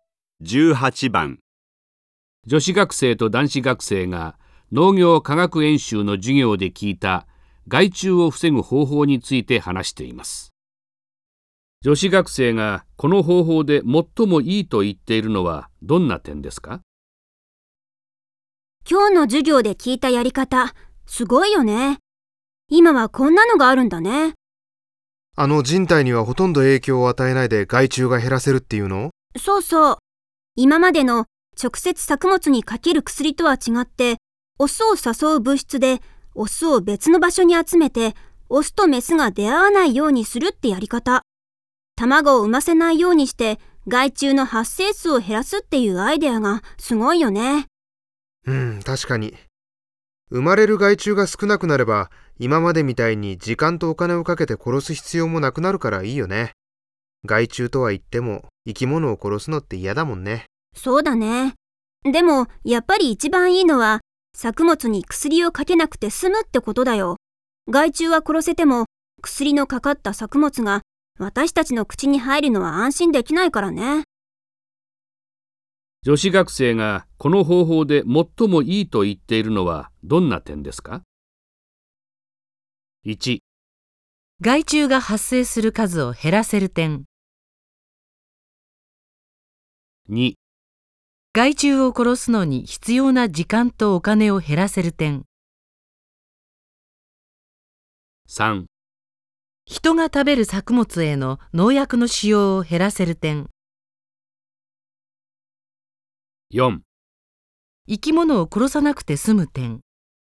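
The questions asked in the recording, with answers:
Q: 女子学生がこの方法で最もいいと言っているのはどんな点ですか?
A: 3: 人が食べる作物への農薬の使用を減らせる点。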